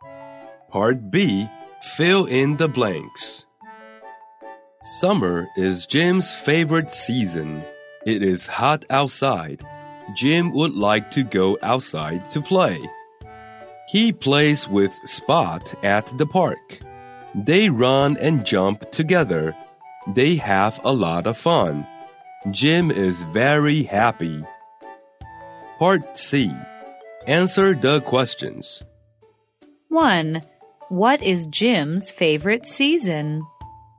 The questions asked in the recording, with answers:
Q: What is Jim's favorite season?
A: Summer is Jim's favorite season.